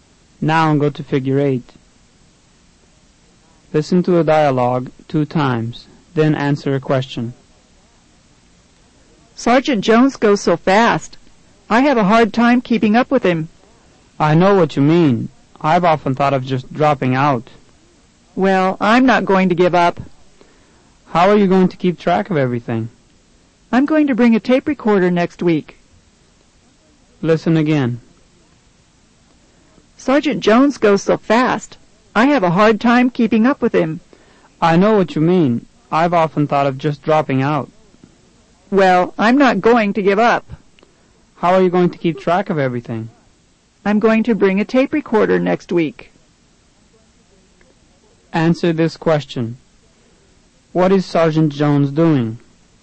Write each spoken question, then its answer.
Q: What is Sergeant Jones doing?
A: Number 1 is B, teaching a class.